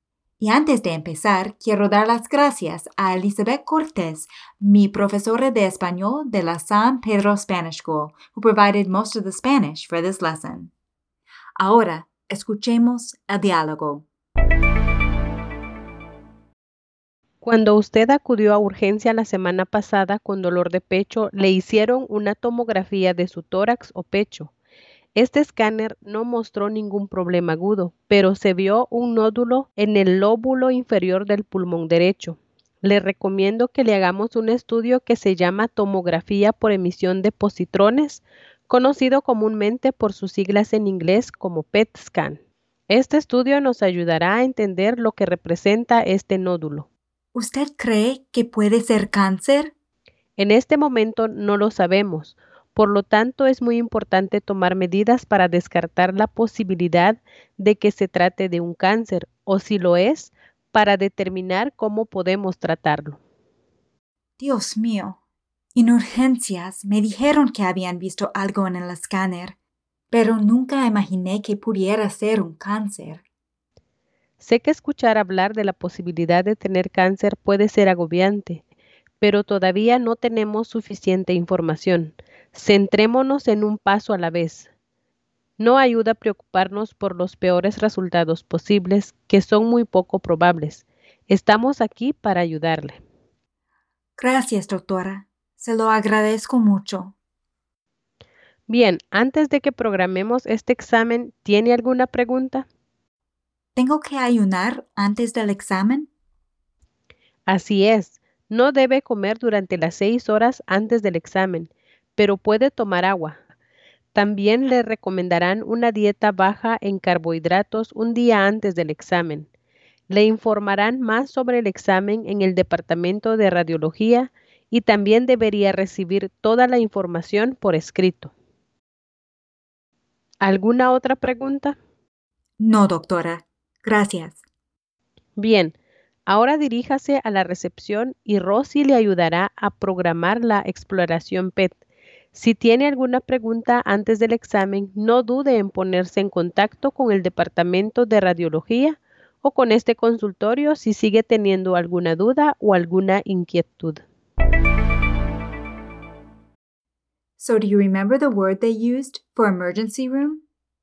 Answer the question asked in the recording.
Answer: Las urgencias. Cuando usted acudió a urgencia la semana pasada.